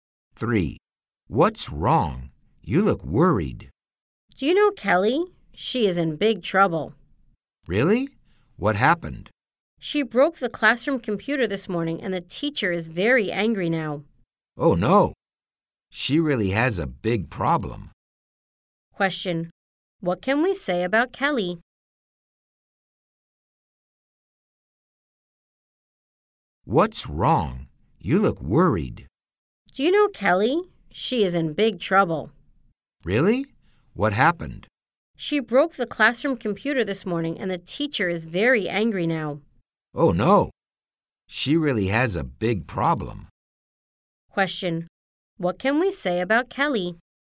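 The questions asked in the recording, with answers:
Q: Question. What can we say about Kelly?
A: She is in big trouble because she broke the classroom computer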